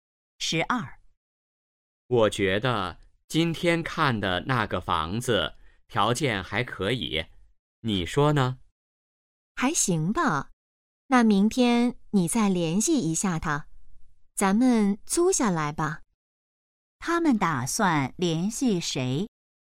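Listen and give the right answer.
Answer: 房东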